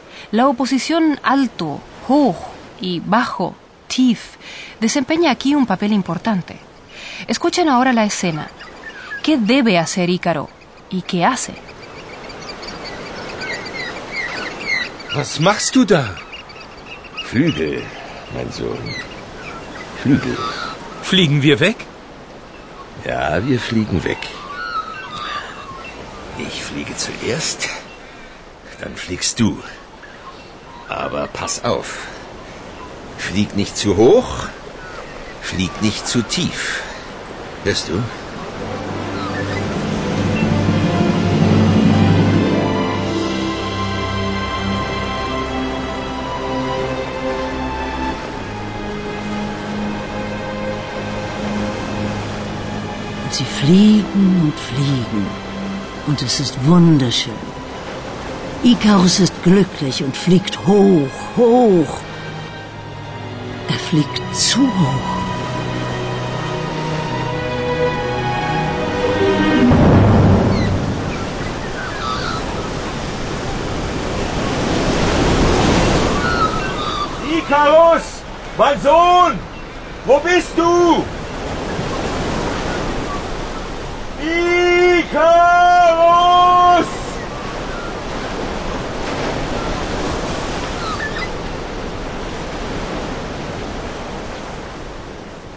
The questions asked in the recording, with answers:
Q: ¿Qué debe hacer Ícaro?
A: Por una parte, Ícaro no debe volar demasiado alto.